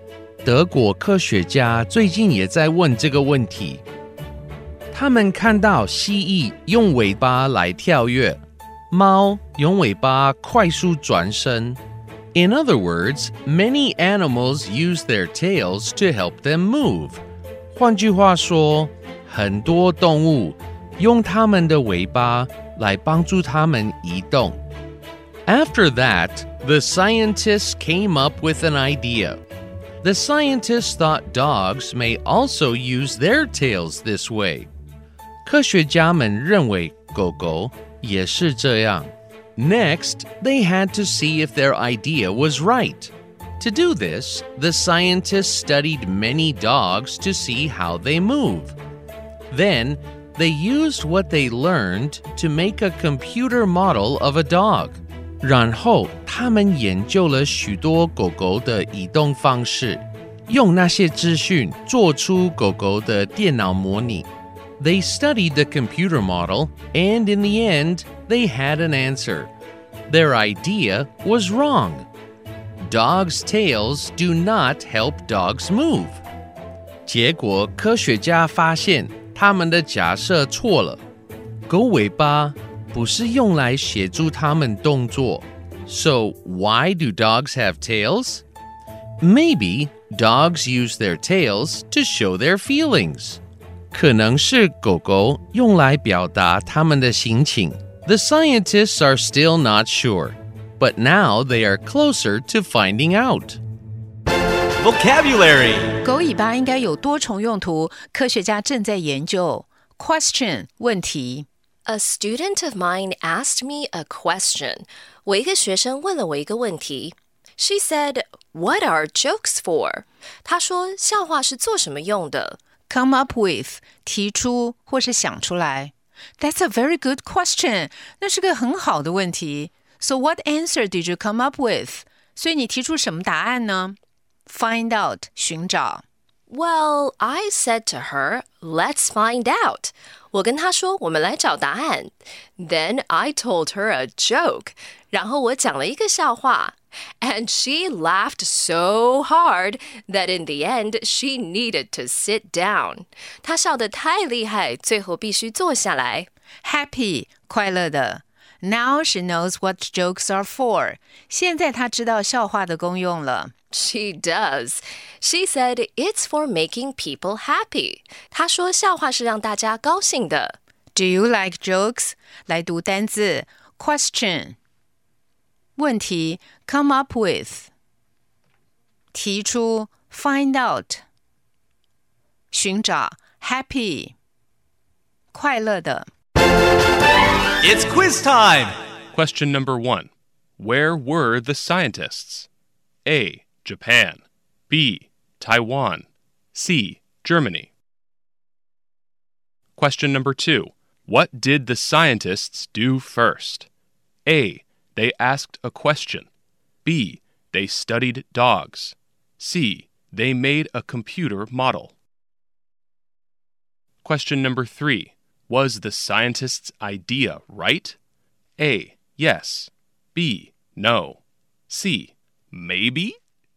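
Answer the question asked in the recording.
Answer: B: No.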